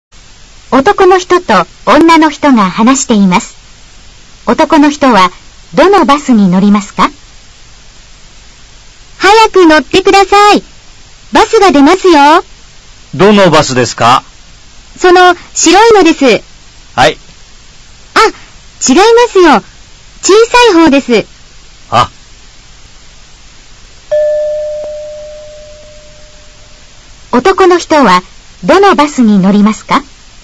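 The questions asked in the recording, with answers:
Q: 男の人はどのバスに乗りますか?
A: 白くて小さいバス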